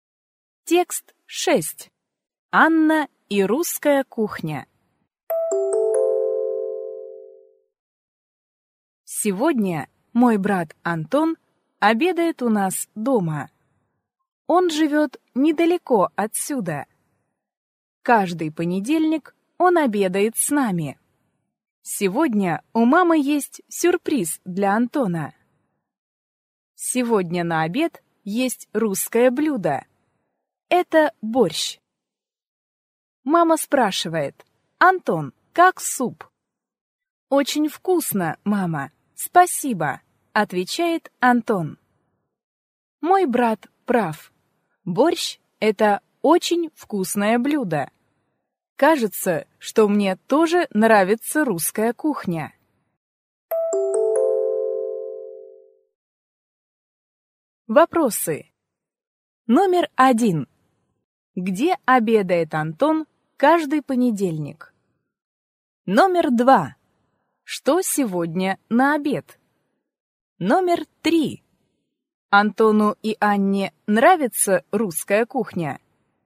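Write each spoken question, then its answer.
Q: Где обедает Антон каждый понедельник?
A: У Анны дома (у них дома, с семьёй)

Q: Что сегодня на обед?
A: Борщ

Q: Антону и Анне нравится русская кухня?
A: Да, нравится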